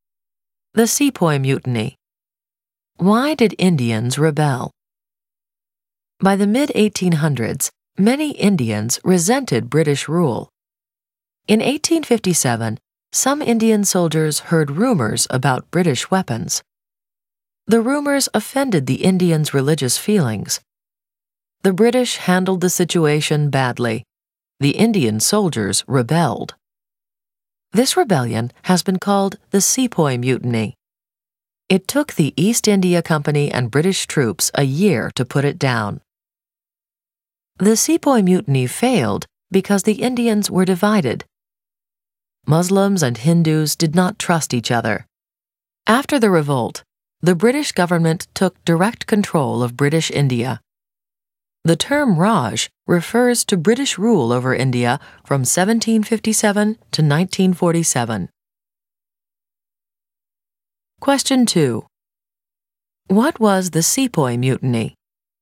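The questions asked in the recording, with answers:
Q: What was the Sepoy Mutiny?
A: A rebellion by Indian soldiers (sepoys) against the British in 1857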